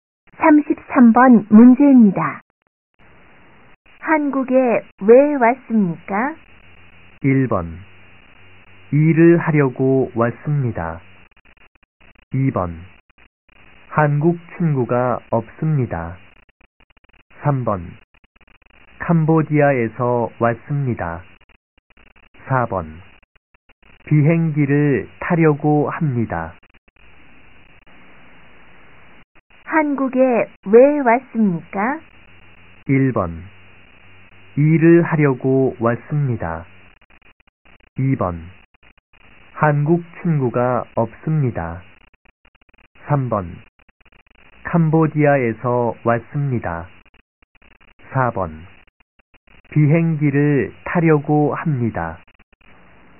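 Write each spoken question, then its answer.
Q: 한국에 왜 왔습니까?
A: 1: 일을 하려고 왔습니다.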